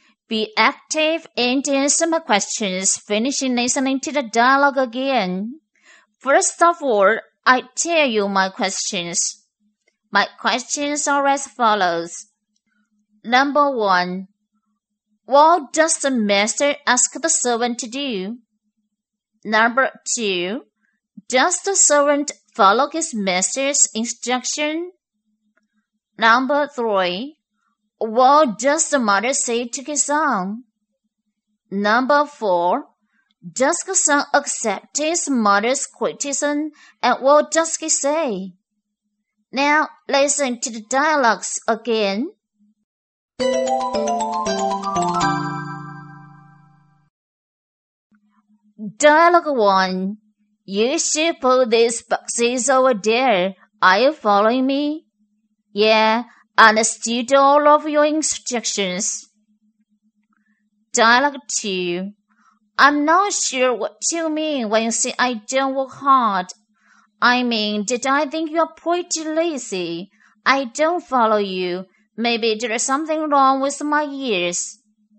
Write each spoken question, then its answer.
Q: what does the master ask the servant to do?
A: he asks servant to put those boxes over there.

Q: does the servant follow his master's instruction?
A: yeah, he does.

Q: what does the mother say to his son?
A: he says to his son he's pretty lazy and need to work hard.

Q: does the son accept his mother's criticism and what does he say?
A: no, he doesn't.